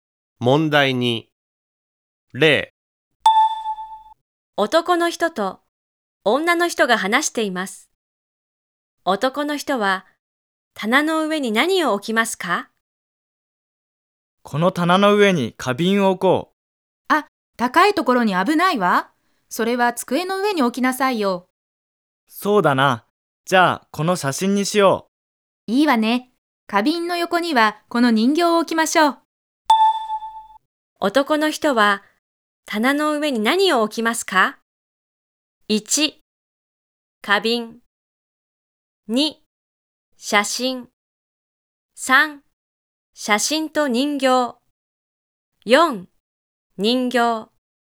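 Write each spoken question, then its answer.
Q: 男の人は棚の上に何を置きますか?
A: 2: 写真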